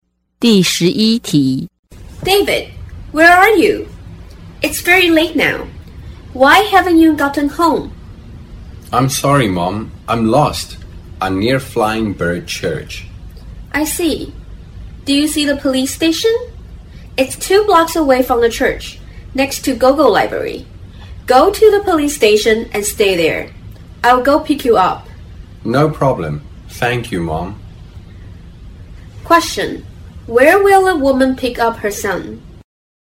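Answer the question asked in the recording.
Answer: At the police station next to Gogo Library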